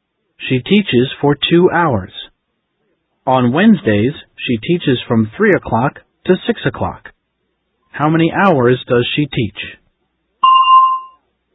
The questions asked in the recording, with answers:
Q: How many hours does she teach?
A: She teaches for 3 hours.